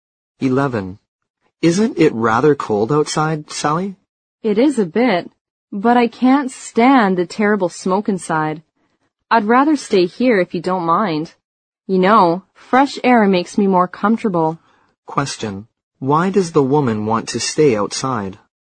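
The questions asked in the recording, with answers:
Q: Why does the woman want to stay outside?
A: She can't stand the smoke inside and prefers fresh air.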